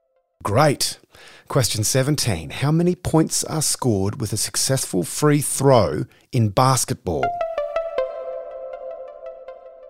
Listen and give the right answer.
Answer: 1 point per free throw.